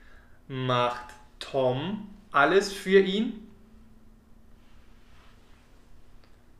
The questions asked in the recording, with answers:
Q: Macht Tom alles für ihn?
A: Nein, nicht Tom macht alles für ihn, sondern seine Natalia.